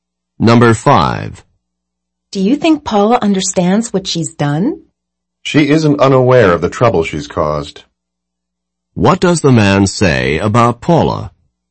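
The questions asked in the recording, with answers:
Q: What does the man say about Paula?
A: She knows the trouble she has caused.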